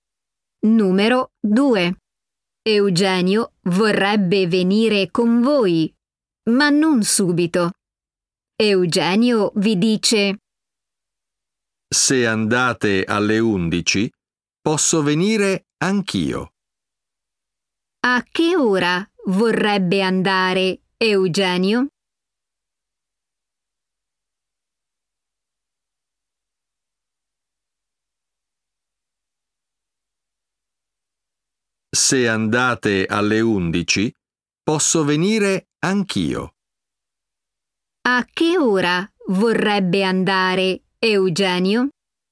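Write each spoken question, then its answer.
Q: A che ora vorrebbe andare Eugenio?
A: alle 11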